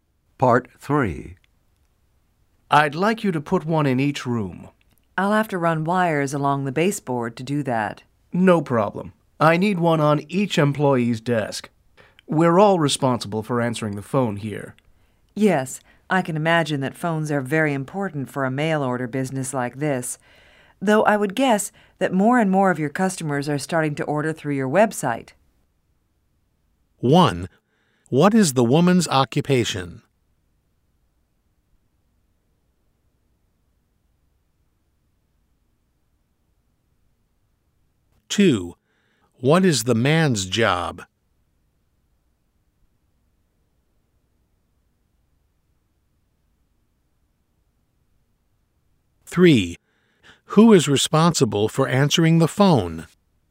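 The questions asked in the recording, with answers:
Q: who is responsible for answering the phone?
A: All the employees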